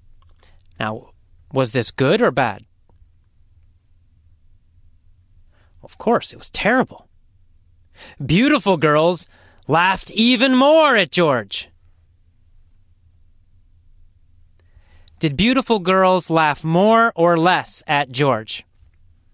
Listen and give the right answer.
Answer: More. They laughed more.